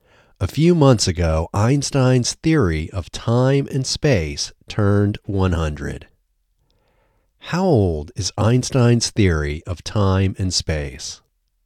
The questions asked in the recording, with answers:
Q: How old is Einstein's theory of time and space?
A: Einstein's theory of time and space is 100 years old.